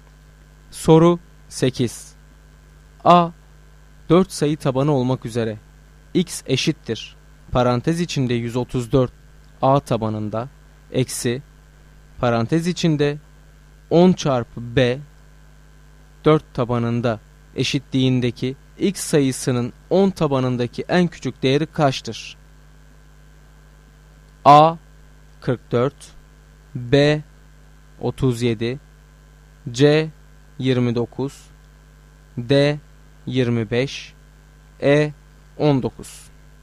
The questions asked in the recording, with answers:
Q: A 4 sayı tabanı olmak üzere x eşittir parantez içinde 134 A tabanında eksi parantez içinde 10 çarpı B 4 tabanında eşitliğindeki x sayısının 10 tabanındaki en küçük değeri kaçtır?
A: Doğru cevap D şıkkı.